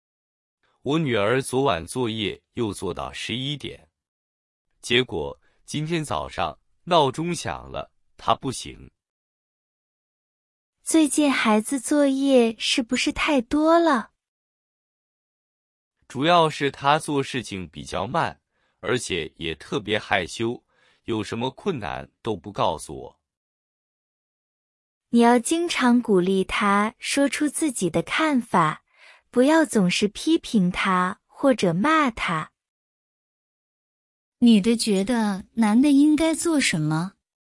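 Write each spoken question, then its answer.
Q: 女的觉得男的应该做什么?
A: 经常鼓励孩子说出自己的看法,不要总是批评或骂孩子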